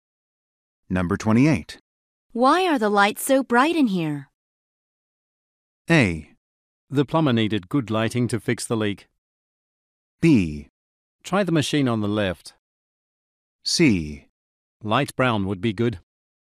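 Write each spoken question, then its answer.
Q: Why are the lights so bright in here?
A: A: The plumber needed good lighting to fix the leak.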